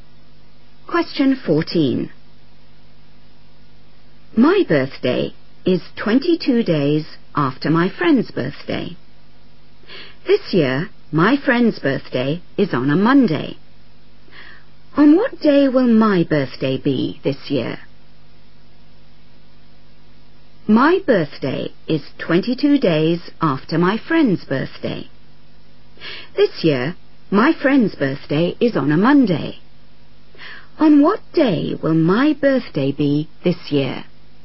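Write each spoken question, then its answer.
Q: On what day will my birthday be this year?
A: Tuesday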